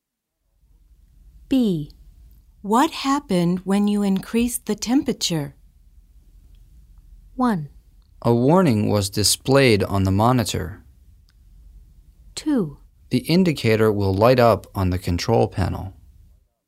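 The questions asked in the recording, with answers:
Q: What happened when you increased the temperature?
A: 1: A warning was displayed on the monitor.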